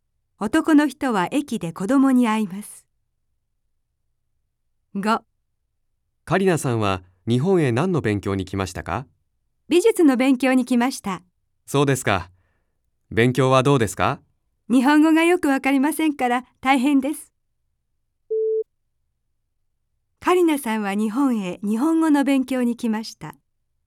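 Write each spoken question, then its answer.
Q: カリナさんは日本へ日本語の勉強に来ました。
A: ×(美術の勉強)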